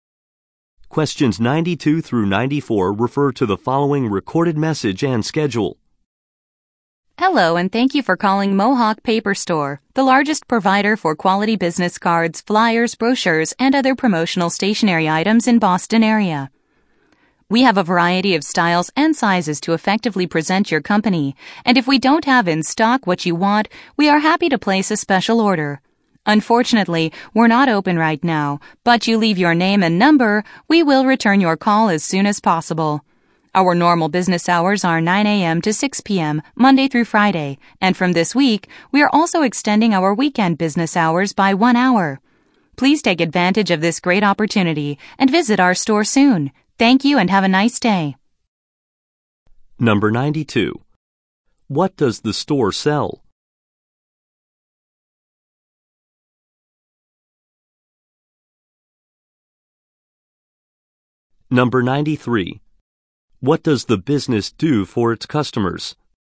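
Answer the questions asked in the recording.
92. Business cards, flyers, brochures and promotional stationery
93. Places special orders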